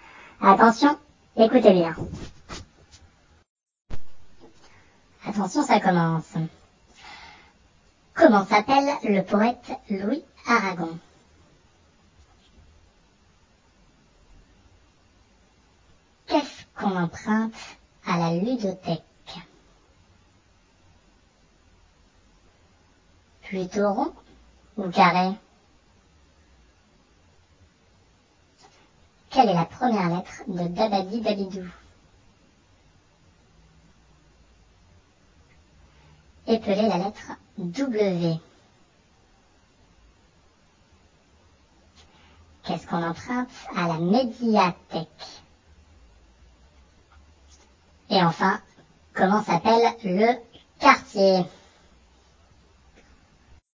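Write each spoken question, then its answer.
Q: Comment s'appelle le poète Louis Aragon?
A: Louis Aragon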